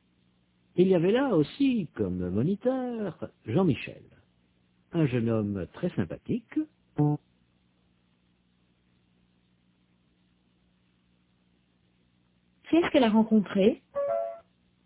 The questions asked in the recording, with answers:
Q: qui est-ce qu'elle a rencontré?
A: Un jeune homme très sympathique.